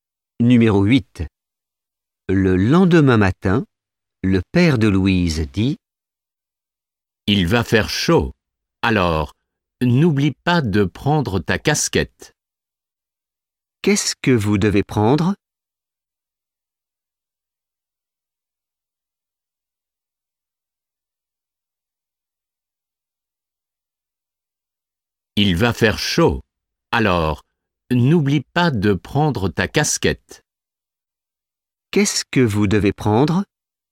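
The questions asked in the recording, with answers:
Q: Qu'est-ce que vous devez prendre?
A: Une casquette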